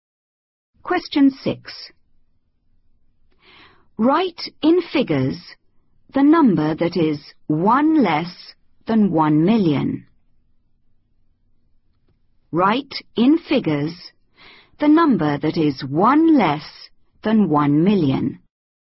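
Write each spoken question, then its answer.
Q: Write in figures the number that is 1 less than 1 million.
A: 999999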